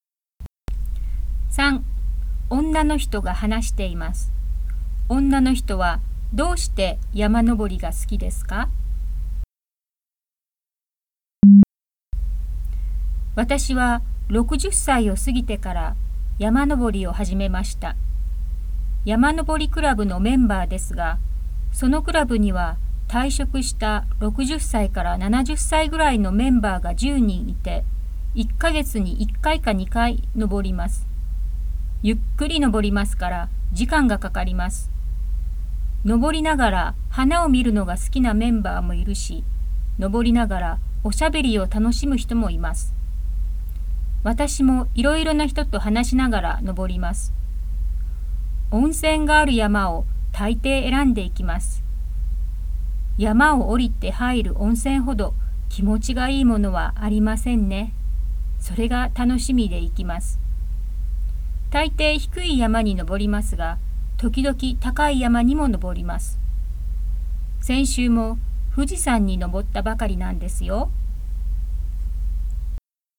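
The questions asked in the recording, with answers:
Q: 女の人はどうして山登りが好きですか?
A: 山を降りて入る温泉が楽しみだから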